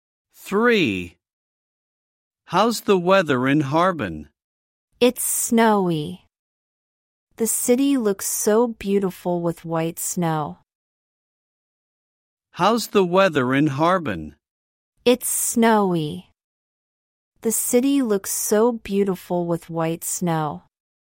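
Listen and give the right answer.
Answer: It's snowy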